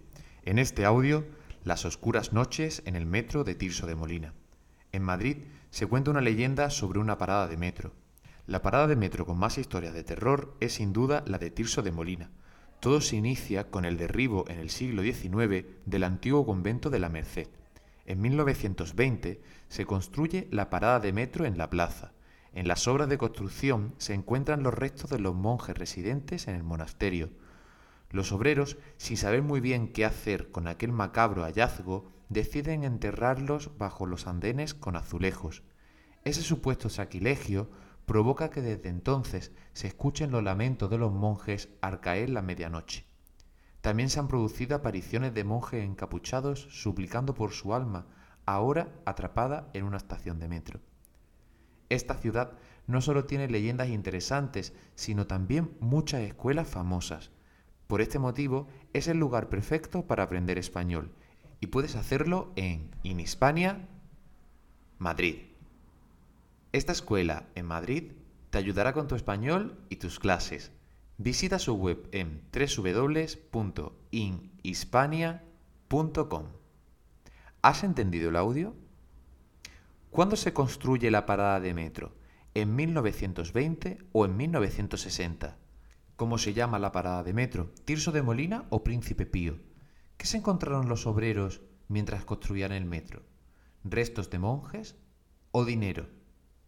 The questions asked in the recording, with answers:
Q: ¿Cuándo se construye la parada de metro?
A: 1920

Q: ¿Cómo se llama la parada de metro?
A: Tirso de Molina